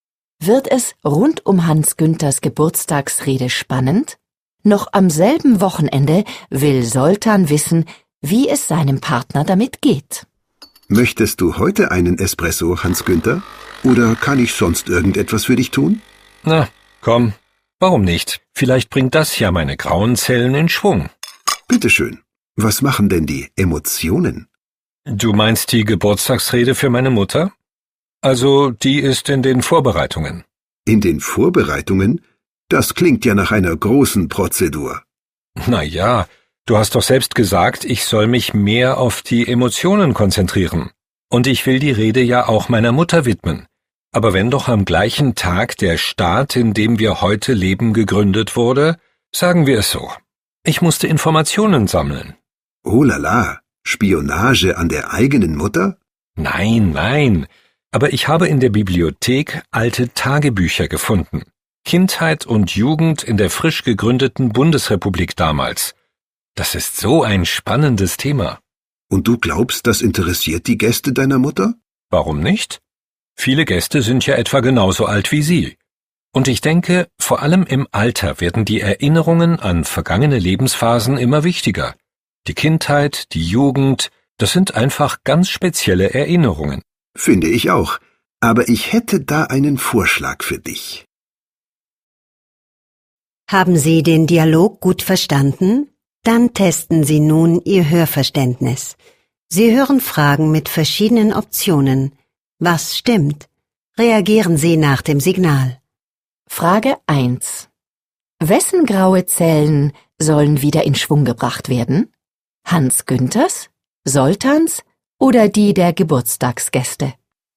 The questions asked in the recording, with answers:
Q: Wessen graue Zellen sollen wieder in Schwung gebracht werden?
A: Hans Günther möchte einen Kaffee.